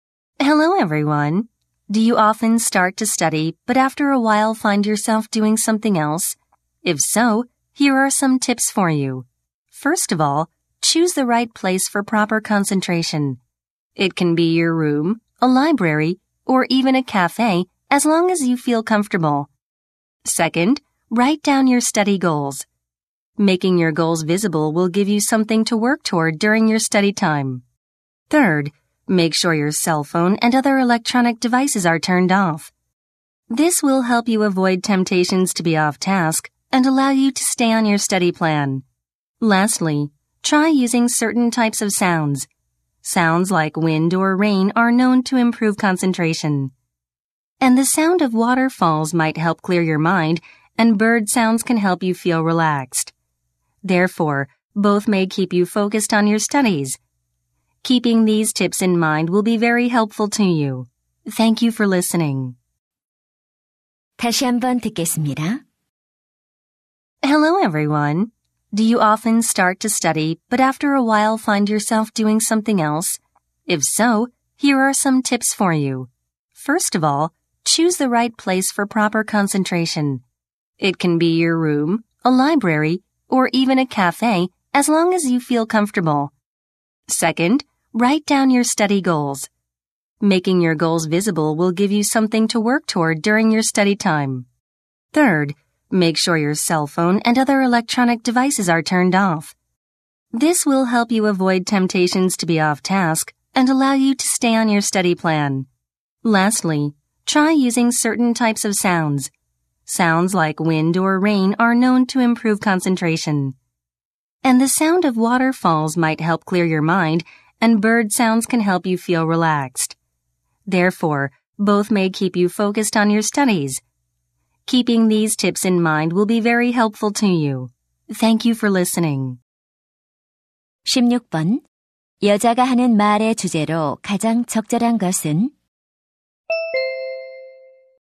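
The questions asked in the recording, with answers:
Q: 여자가 하는 말의 주제로 가장 적절한 것은?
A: 공부에 집중하는 데 도움이 되는 방법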